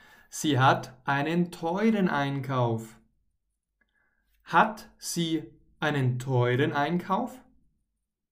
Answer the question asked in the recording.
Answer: Ja, genau. Sie hat einen teuren Einkauf.